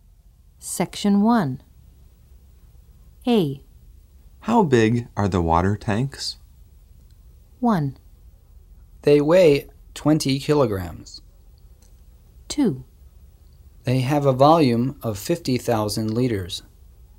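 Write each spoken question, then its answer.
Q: How big are the water tanks?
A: 2: They have a volume of 50,000 liters.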